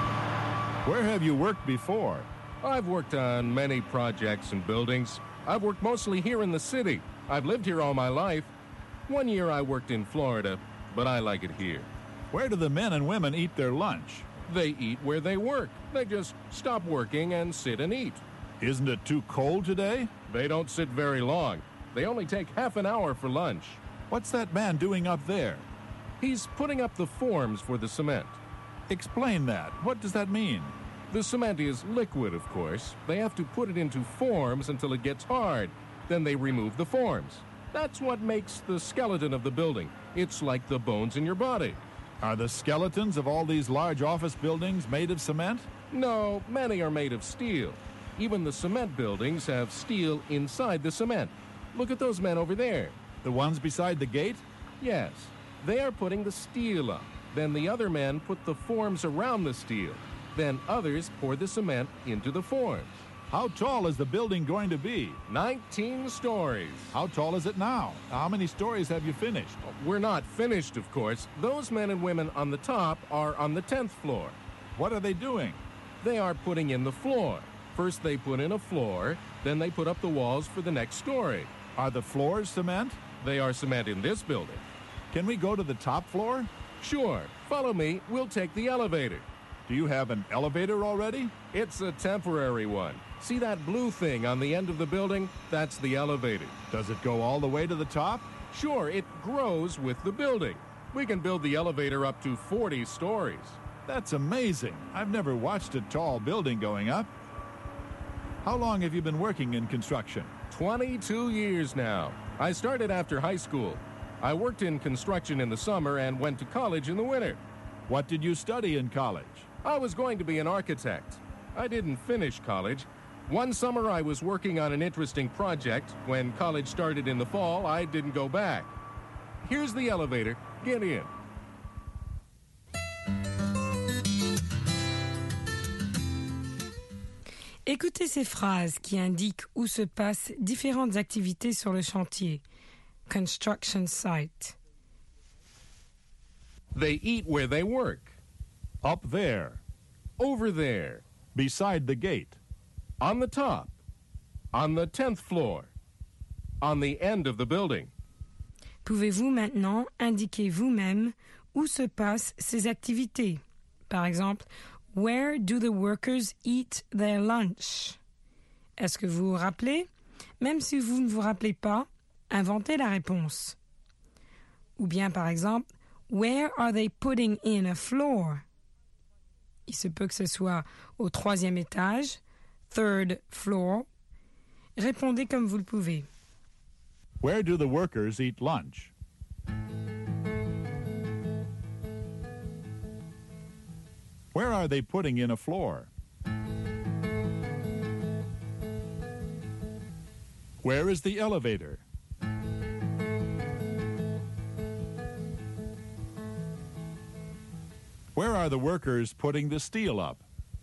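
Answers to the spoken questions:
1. Where they work
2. On the 10th floor, on the top
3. On the end of the building
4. Beside the gate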